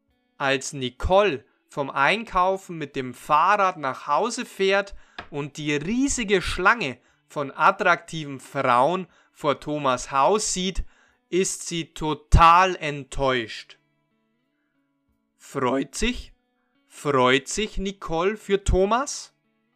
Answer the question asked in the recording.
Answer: Nein, sie freut sich nicht für Thomas.